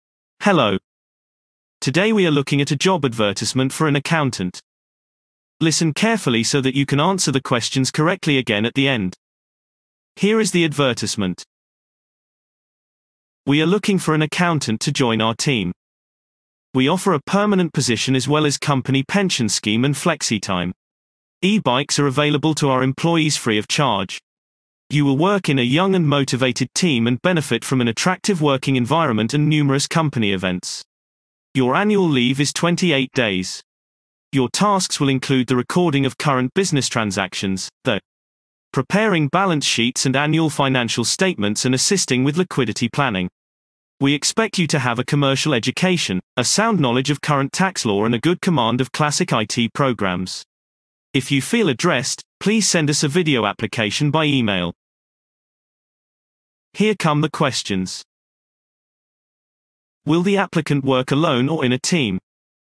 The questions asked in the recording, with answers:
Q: Will the applicant work alone or in a team?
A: Response. The applicant will work in a team.